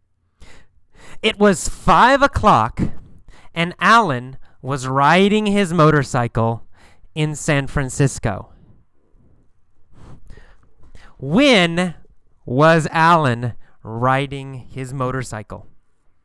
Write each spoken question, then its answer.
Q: When was Alan riding his motorcycle?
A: Well, at 5 o'clock, right?